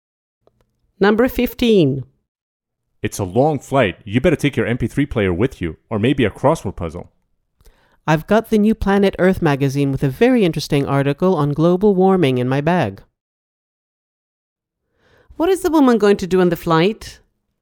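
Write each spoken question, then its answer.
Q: What is the woman going to do on the flight?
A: Read a magazine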